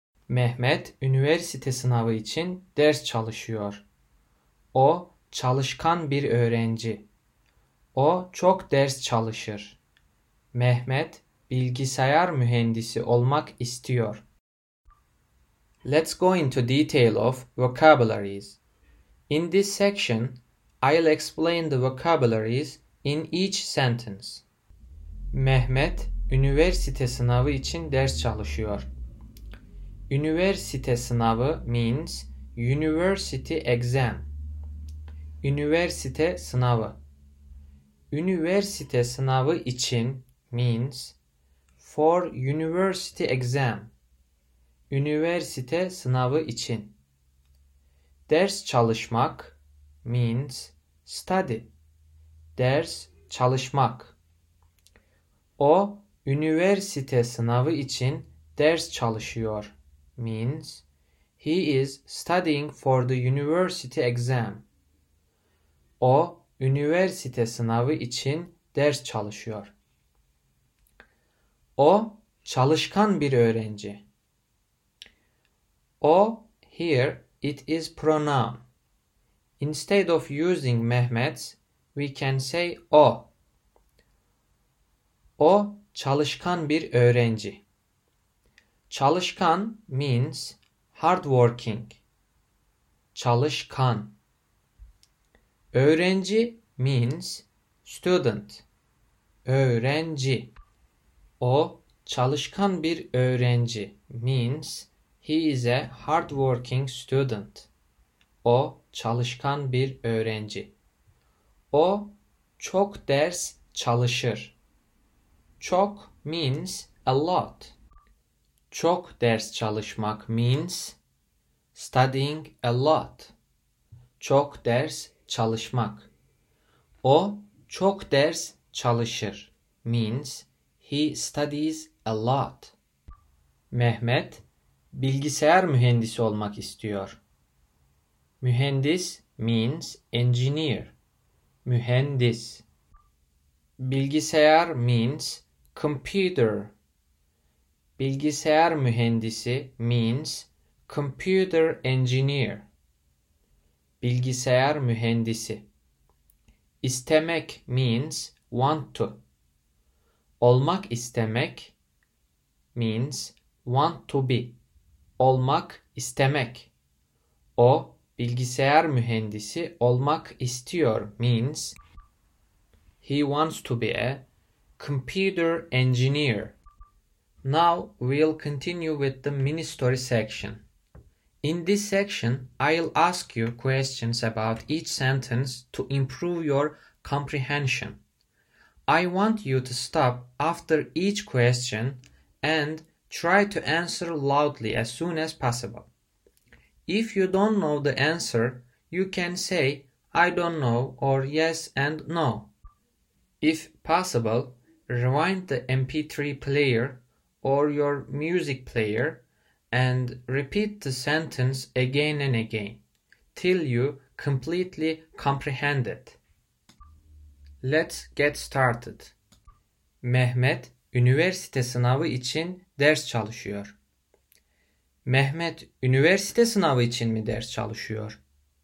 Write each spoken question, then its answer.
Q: Mehmet üniversite sınavı için mi ders çalışıyor?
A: Evet, Mehmet üniversite sınavı için ders çalışıyor.